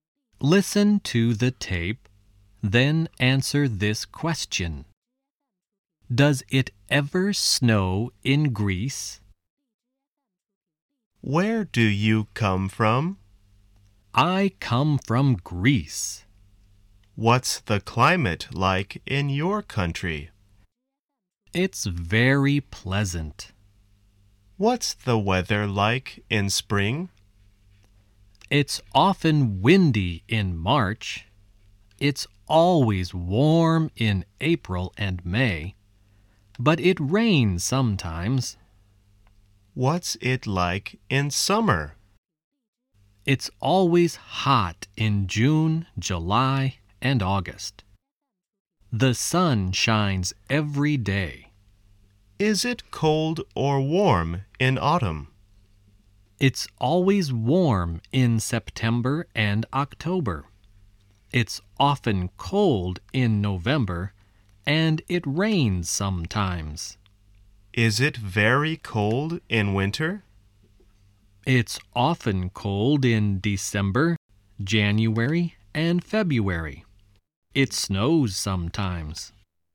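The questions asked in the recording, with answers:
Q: Does it ever snow in Greece?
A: Yes, it snows sometimes (in winter).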